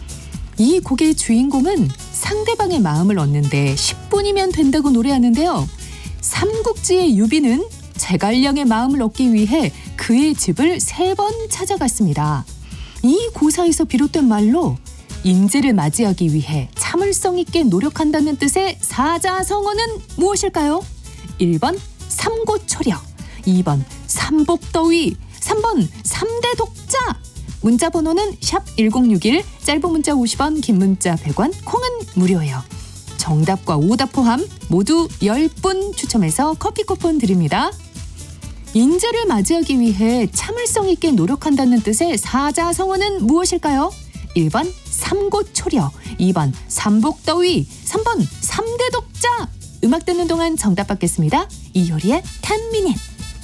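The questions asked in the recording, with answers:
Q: 인재를 맞이하기 위해 참을성 있게 노력한다는 뜻의 사자성어는 무엇일까요?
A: 1번: 삼고초려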